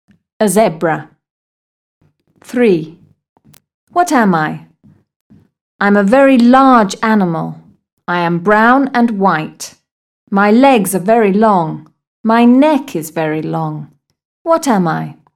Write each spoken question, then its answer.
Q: What am I?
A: A giraffe.